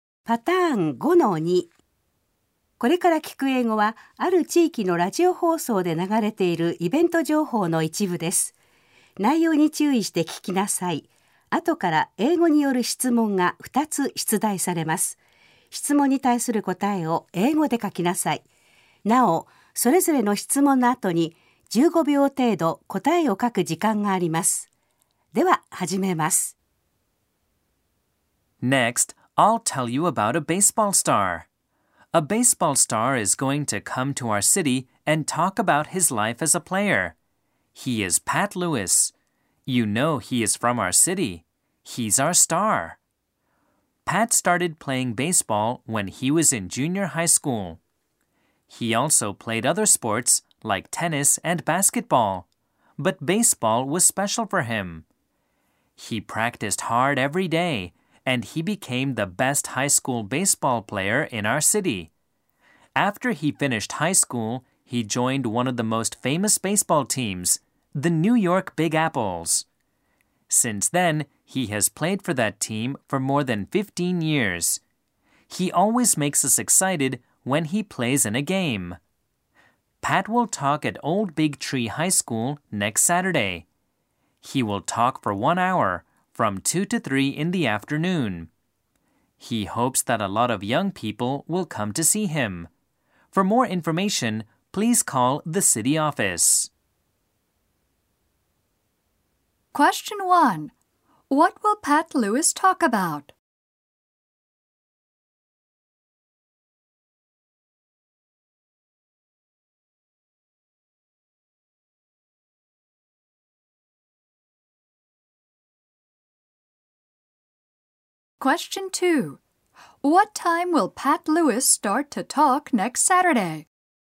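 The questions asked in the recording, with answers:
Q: What will Pat Lewis talk about?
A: He will talk about his life as a baseball player.

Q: What time will Pat Lewis start to talk next Saturday?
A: At 2 in the afternoon.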